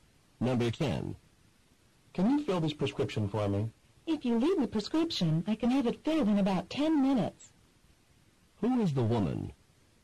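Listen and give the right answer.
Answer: A pharmacist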